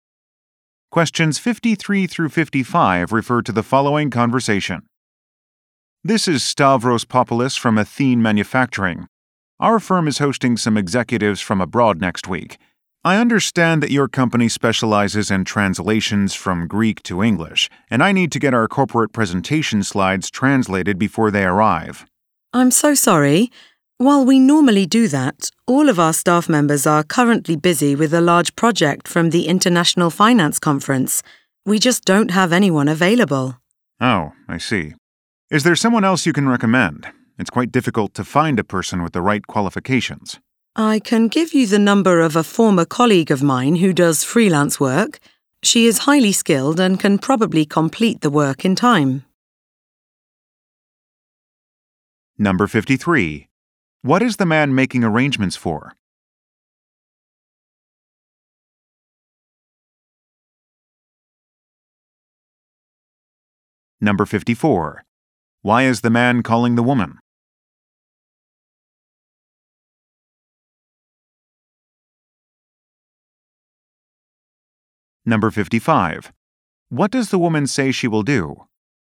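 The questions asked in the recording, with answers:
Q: What is the man making arrangements for?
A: A visit by executives from abroad

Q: Why is the man calling the woman?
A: To get presentation slides translated

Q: What does the woman say she will do?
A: Give him a former colleague's number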